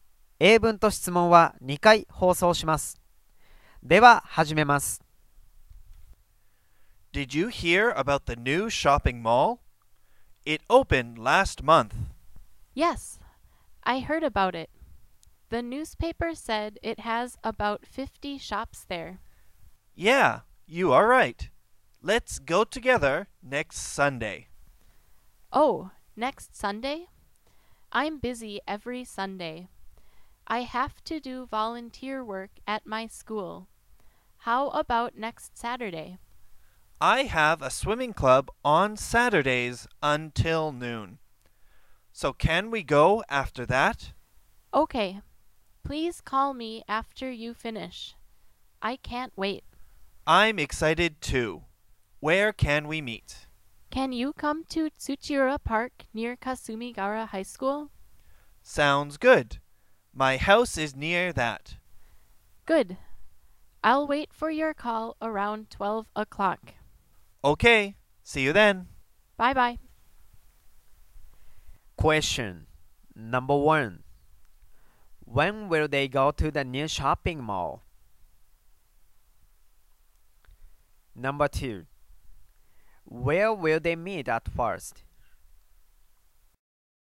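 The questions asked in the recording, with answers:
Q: When will they go to the new shopping mall?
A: Next Saturday afternoon (after noon).

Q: Where will they meet at first?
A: At Tsuchiura Park near Kasumigaura High School.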